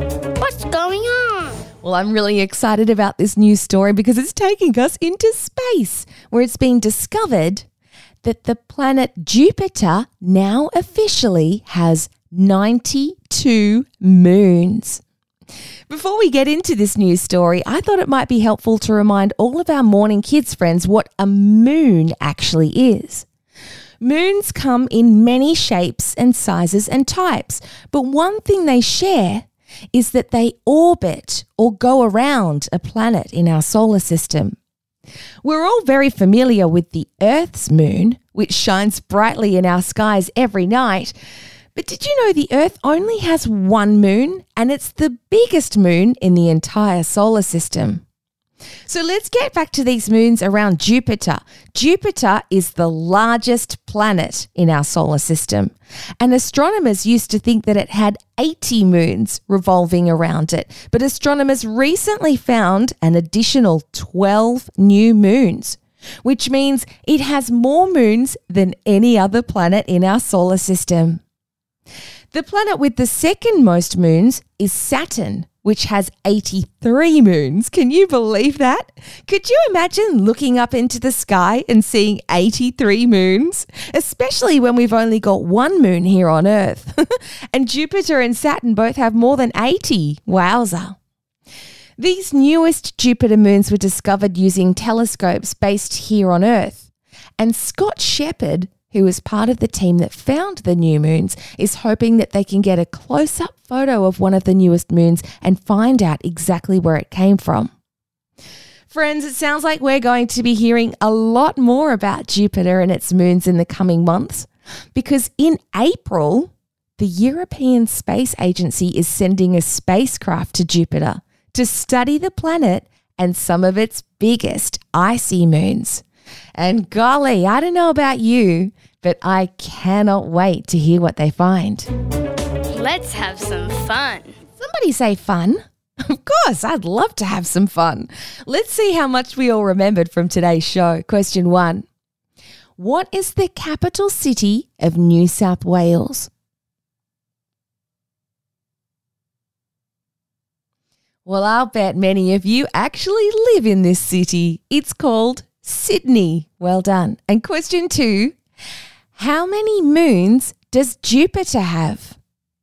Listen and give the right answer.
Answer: But if you said 92, then you are spot on